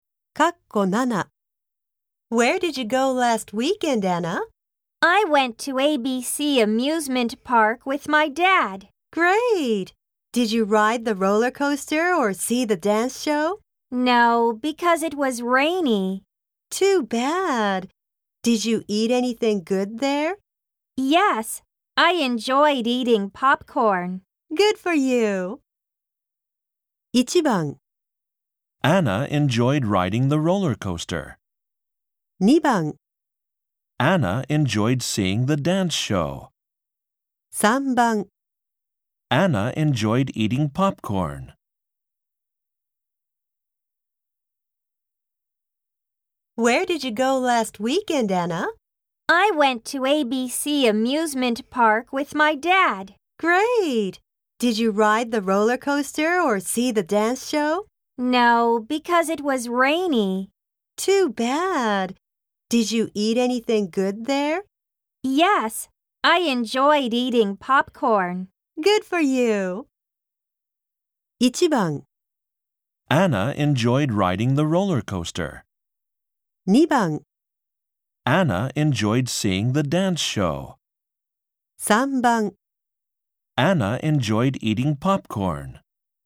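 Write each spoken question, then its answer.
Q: 1番 Anna enjoyed riding the roller coaster. 2番 Anna enjoyed seeing the dance show. 3番 Anna enjoyed eating popcorn.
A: 3: Anna enjoyed eating popcorn.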